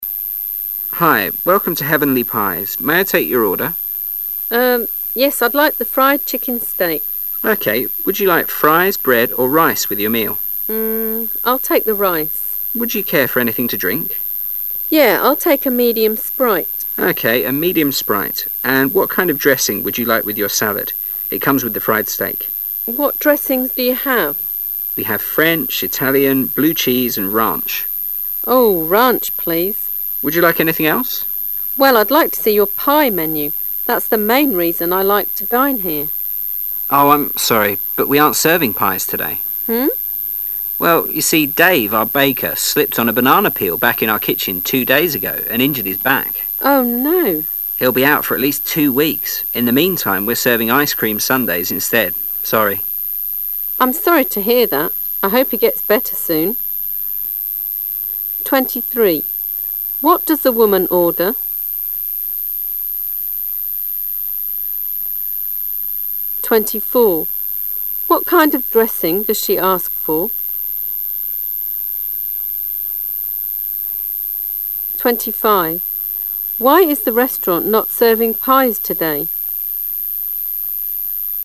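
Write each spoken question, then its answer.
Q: What does the woman order?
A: Fried chicken steak with rice, a medium Sprite, and a salad

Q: What kind of dressing does she ask for?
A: Ranch

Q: Why is the restaurant not serving pies today?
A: The baker slipped on a banana peel and hurt his back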